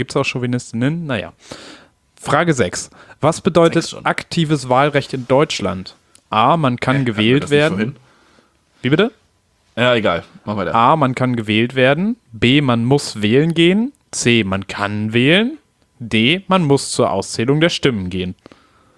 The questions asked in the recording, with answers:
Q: Was bedeutet aktives Wahlrecht in Deutschland?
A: Und aktives ist, man kann wählen.